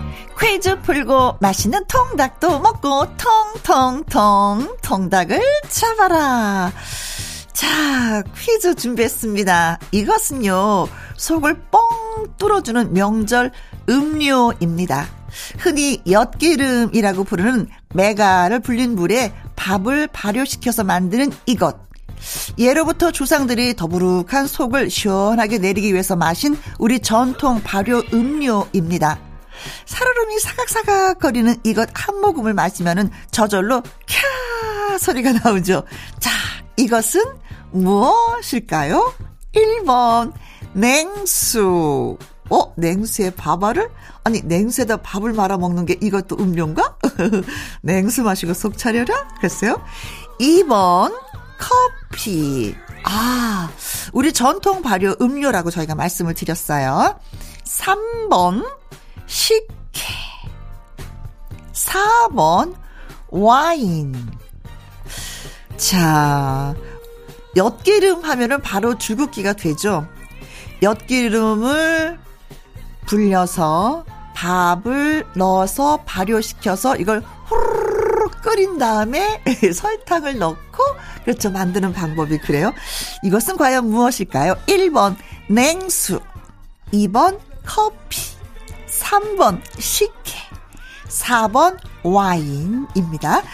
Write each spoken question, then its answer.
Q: 자, 이것은 무엇일까요?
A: 정답은 식혜가 정답.